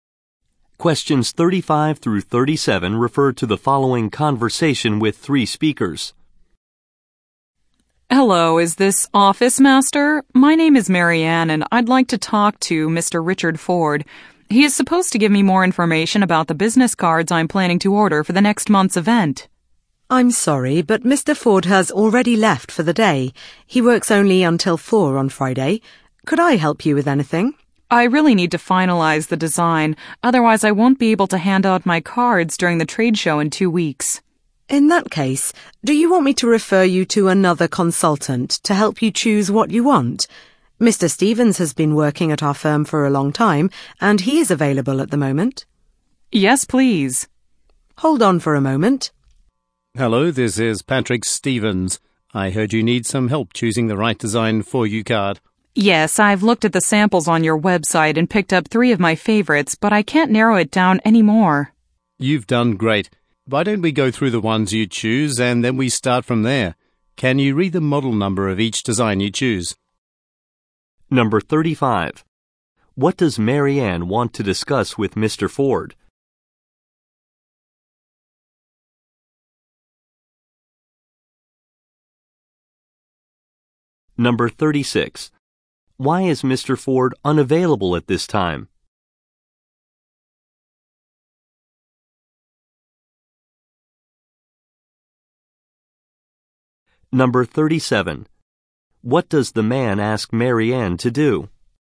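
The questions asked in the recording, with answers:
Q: What does Marianne want to discuss with Mr.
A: Business cards she plans to order

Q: Why is Mr. Ford unavailable at this time?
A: He works only until 4 on Friday and has left for the day

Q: What does the man ask Marianne to do?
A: Read the model number of each design she chose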